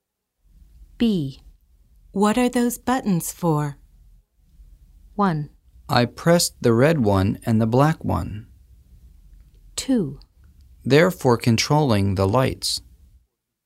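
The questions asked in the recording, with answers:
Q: What are those buttons for?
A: 2: They're for controlling the lights.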